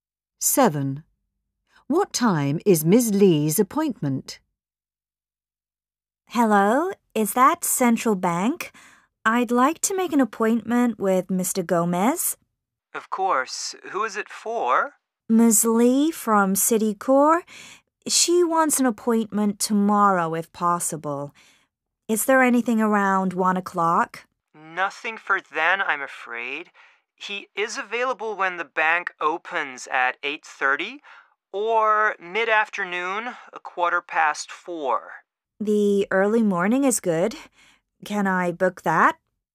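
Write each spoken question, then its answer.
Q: What time is Ms. Lee's appointment?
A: 8:30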